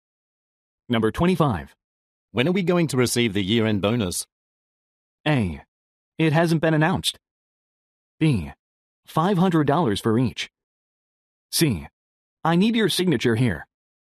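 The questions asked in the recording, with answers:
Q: When are we going to receive the year-end bonus?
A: A: It hasn't been announced.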